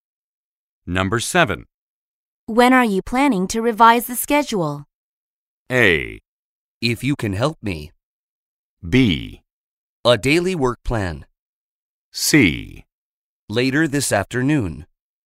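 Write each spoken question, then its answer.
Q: When are you planning to revise the schedule?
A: C: Later this afternoon.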